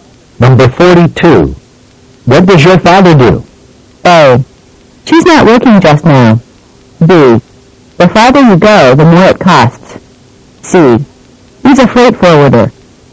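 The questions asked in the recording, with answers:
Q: What does your father do?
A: C: He's a freight forwarder.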